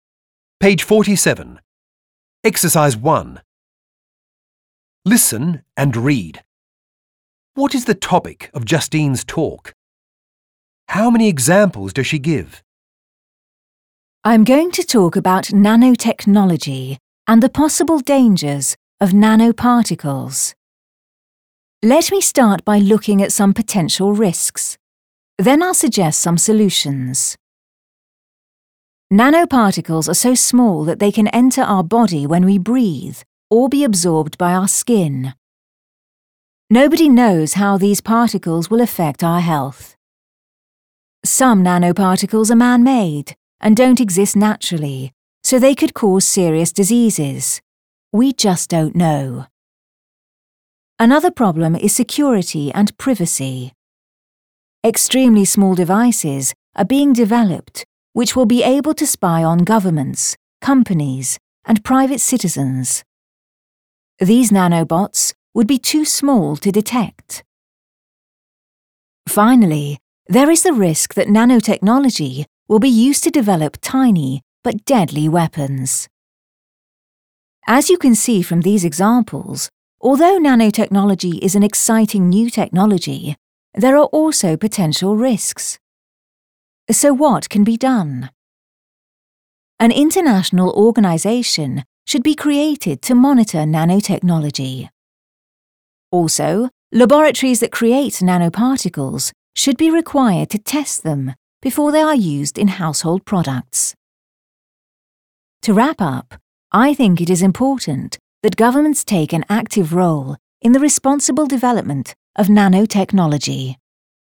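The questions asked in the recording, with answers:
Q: What is the topic of Justine's talk?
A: Nanotechnology and the possible dangers of nanoparticles

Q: How many examples does she give?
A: Three (health, security and privacy, weapons)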